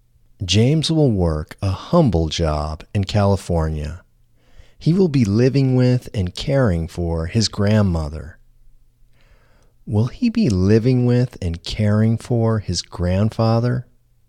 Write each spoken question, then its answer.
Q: Will he be living with and caring for his grandfather?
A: No, he won't be living with and caring for his grandfather.